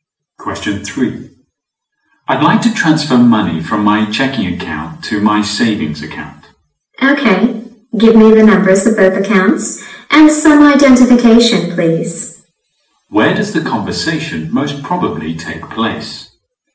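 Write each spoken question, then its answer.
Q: Where does the conversation most probably take place?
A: In a bank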